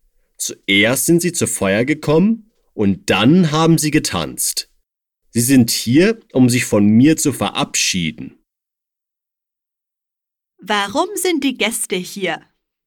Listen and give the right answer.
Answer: Um sich von mir zu verabschieden.